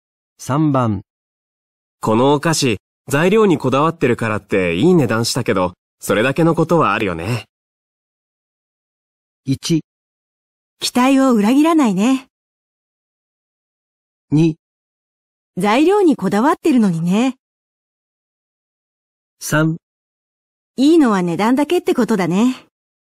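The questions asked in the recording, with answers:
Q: このお菓子、材料にこだわってるからっていい値段したけど、それだけのことはあるよね。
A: 1: 期待を裏切らないね。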